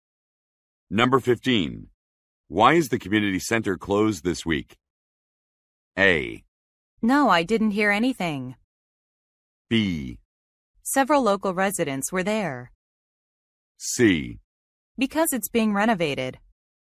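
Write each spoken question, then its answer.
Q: Why is the community center closed this week?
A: C: Because it's being renovated.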